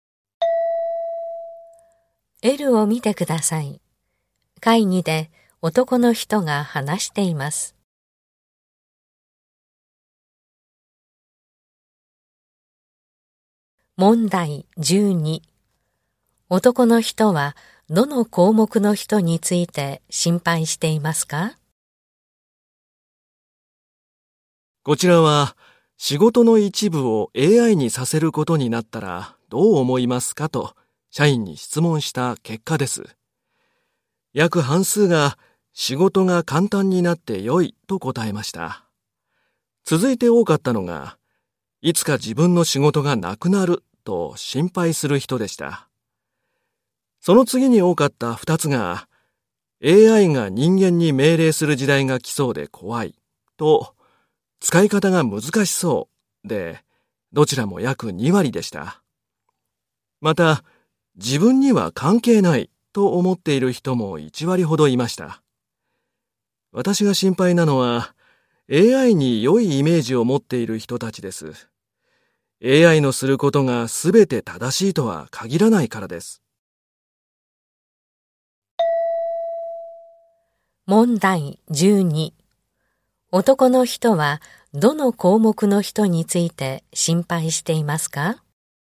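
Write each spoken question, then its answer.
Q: 男の人はどの項目の人について心配していますか?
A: 仕事が簡単になって良いと答えた人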